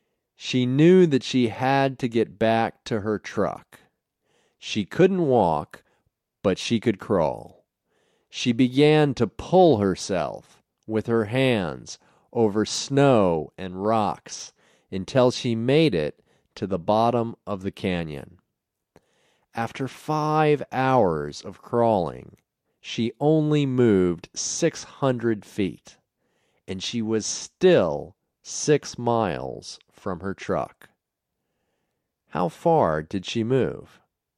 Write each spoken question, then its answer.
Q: How far did she move?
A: She only moved 600 feet.